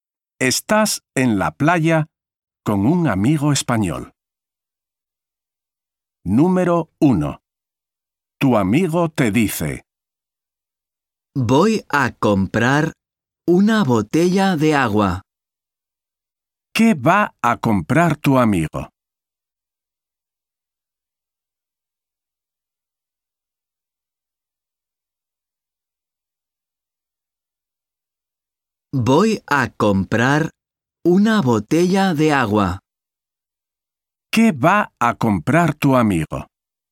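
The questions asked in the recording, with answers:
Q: ¿Qué va a comprar tu amigo?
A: Una botella de agua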